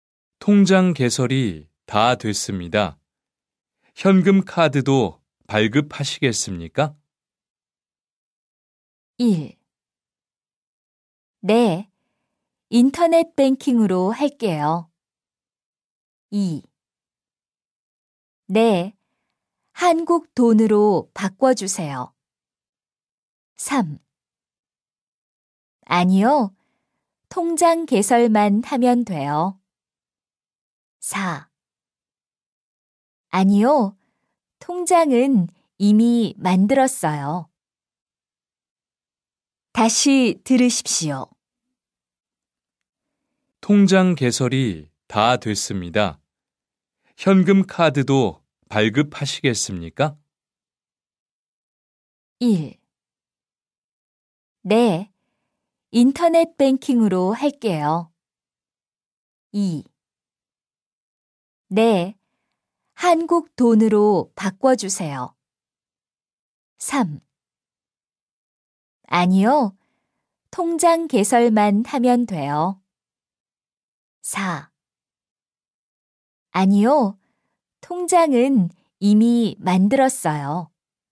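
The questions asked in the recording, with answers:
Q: 통장 개설이 다 됐습니다. 현금 카드도 발급하시겠습니까?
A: 3: 아니요, 통장 개설만 하면 돼요.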